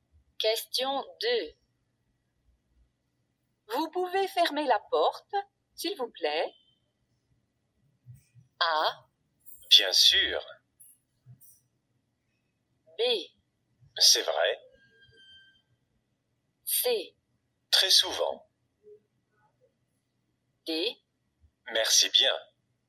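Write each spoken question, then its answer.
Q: Vous pouvez fermer la porte, s'il vous plaît?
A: A: Bien sûr.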